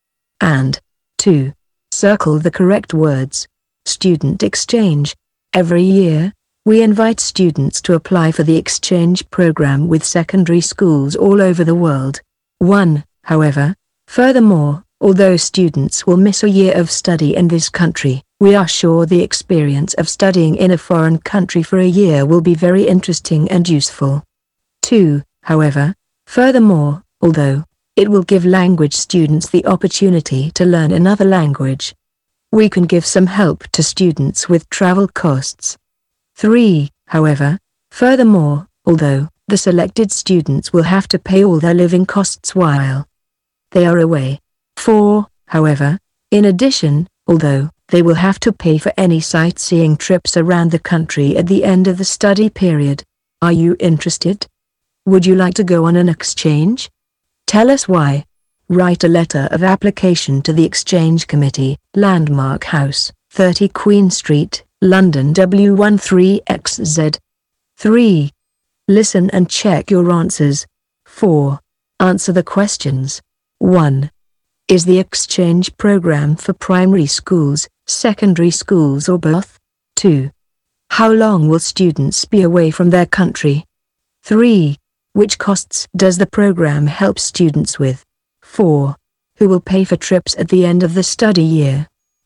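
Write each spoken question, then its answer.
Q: Is the exchange program for primary schools, secondary schools or both?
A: Secondary schools

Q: How long will students be away from their country?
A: A year

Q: Which costs does the program help students with?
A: Travel costs

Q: Who will pay for trips at the end of the study year?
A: The students themselves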